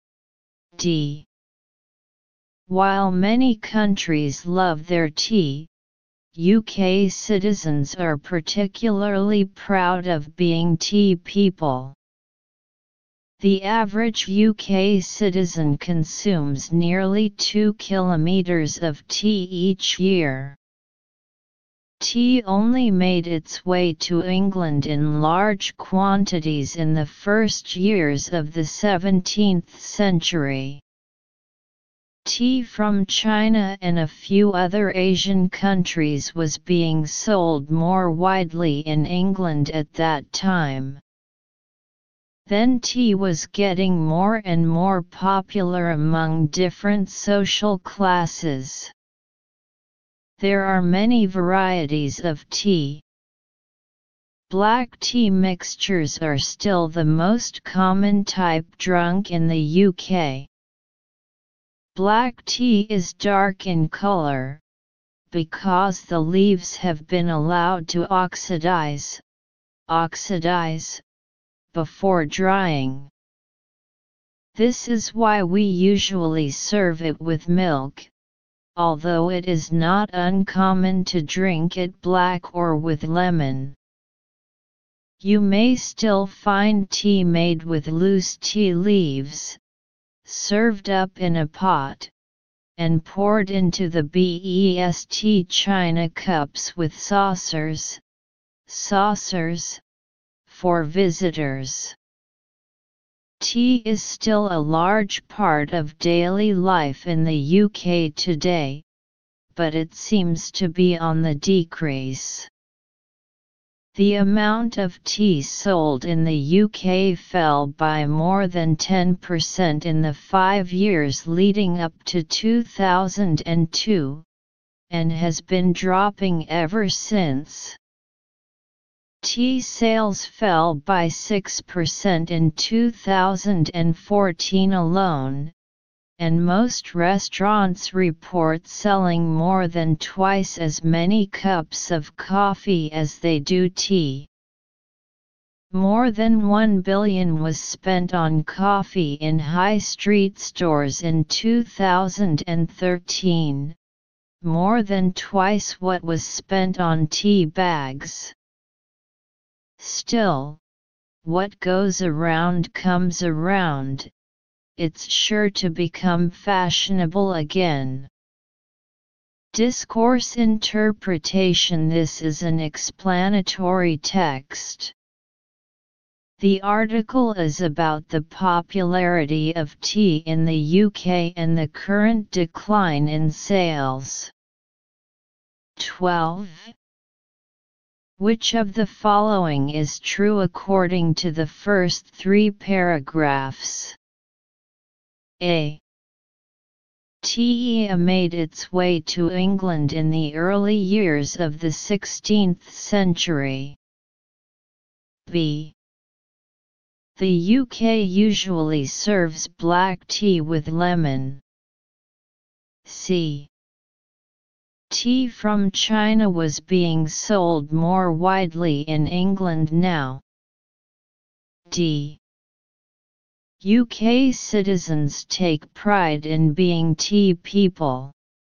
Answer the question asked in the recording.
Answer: D. Detailed comprehension questions.